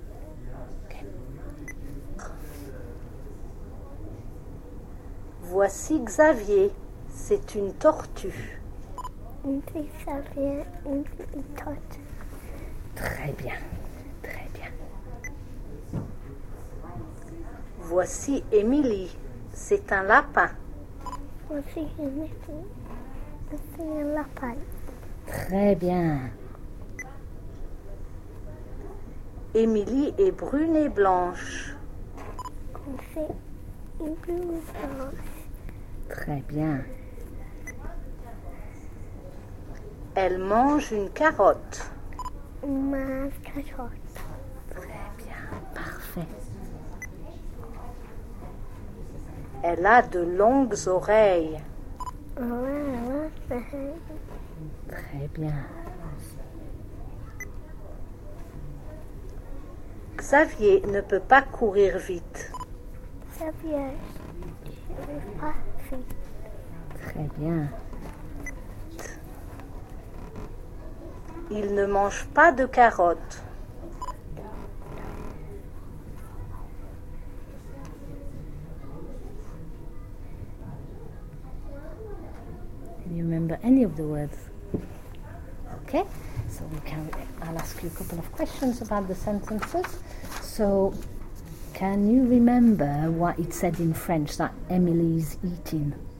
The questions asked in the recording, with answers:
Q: So can you remember what it said in French that Emily is eating?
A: A carrot.